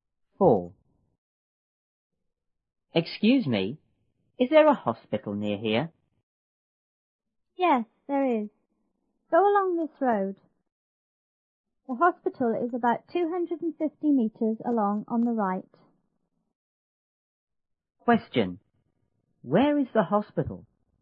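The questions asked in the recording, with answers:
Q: Where is the hospital?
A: About 250 meters along this road on the right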